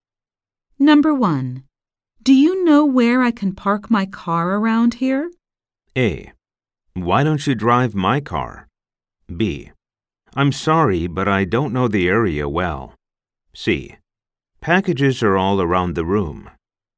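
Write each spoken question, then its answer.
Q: Do you know where I can park my car around here?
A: B: I'm sorry, but I don't know the area well.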